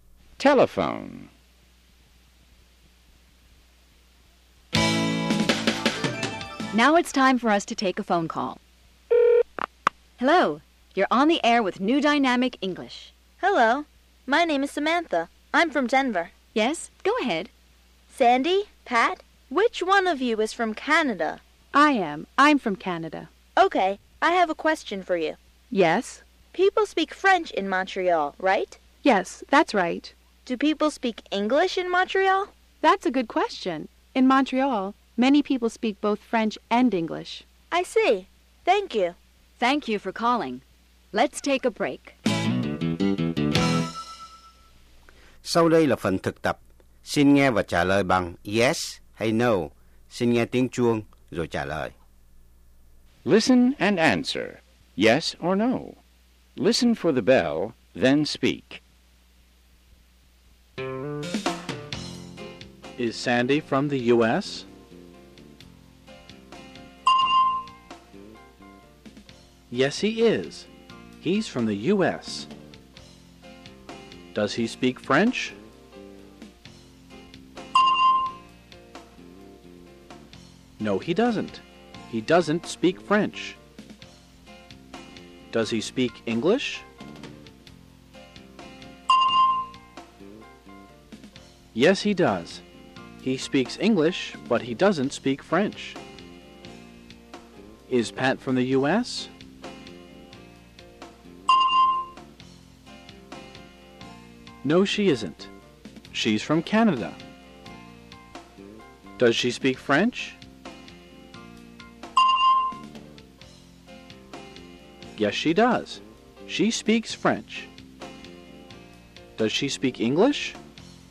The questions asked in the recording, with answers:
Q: Is Sandy from the U.S.?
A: Yes, he is. He's from the U.S.

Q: Does he speak French?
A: No, he doesn't. He doesn't speak French.

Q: Does he speak English?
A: Yes, he does. He speaks English, but he doesn't speak French.

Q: Is Pat from the U.S.?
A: No, she isn't. She's from Canada.